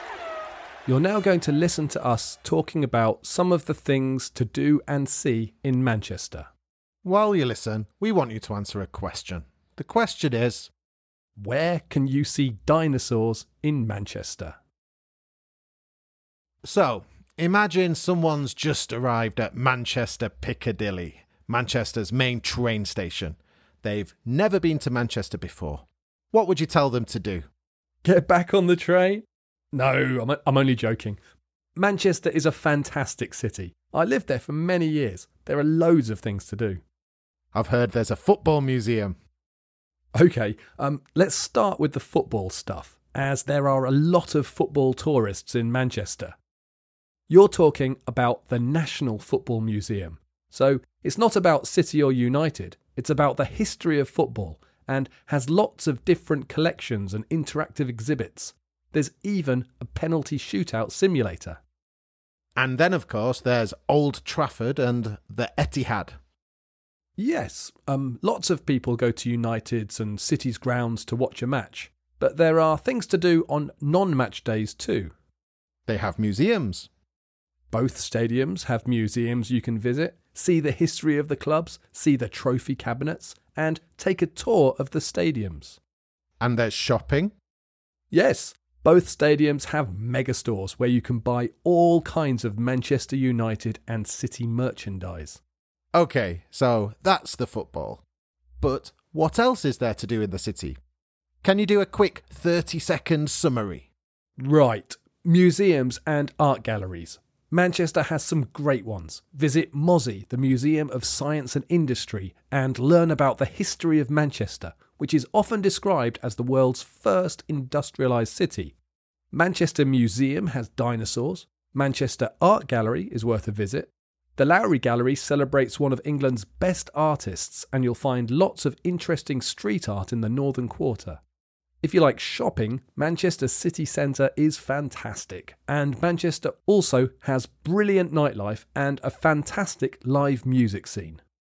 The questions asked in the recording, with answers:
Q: where can you see dinosaurs in Manchester?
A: The answer is the Manchester Museum.